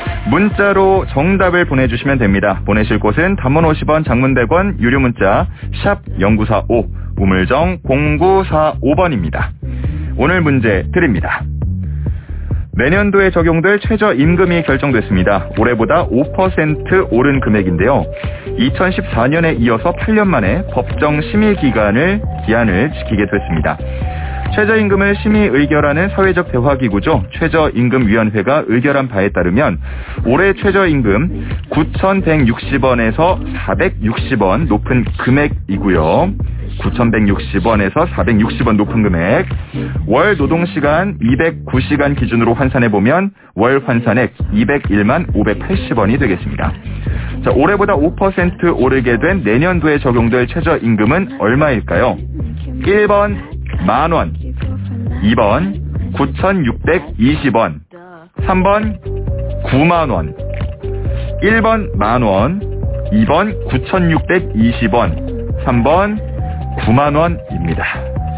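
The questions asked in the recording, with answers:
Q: 자, 올해보다 5% 오르게 된 내년도에 적용될 최저임금은 얼마일까요?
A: 2: 9,620원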